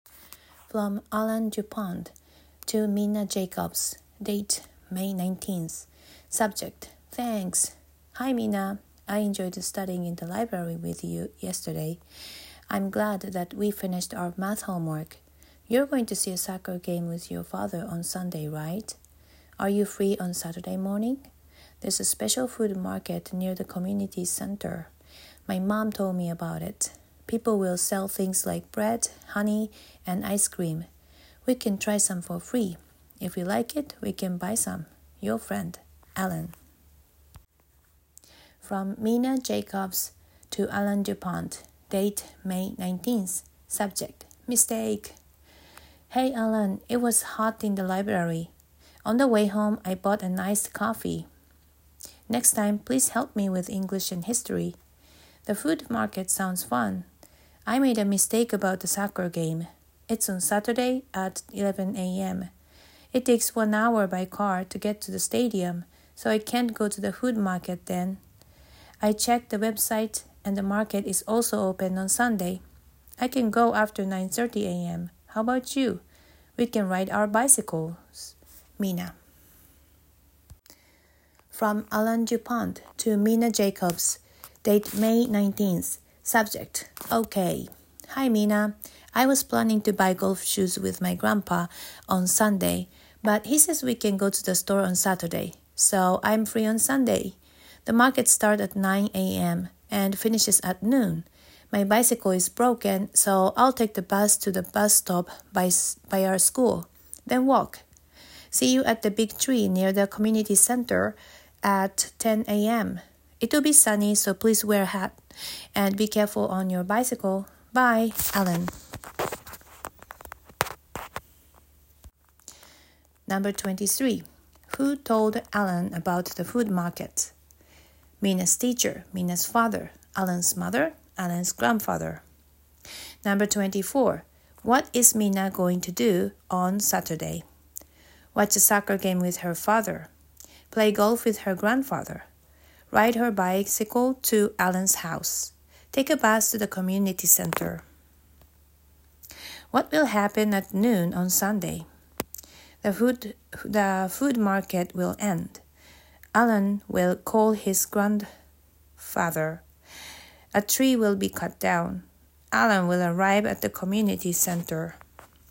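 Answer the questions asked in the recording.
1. Alan's mother
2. Watch a soccer game with her father.
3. The food market will end.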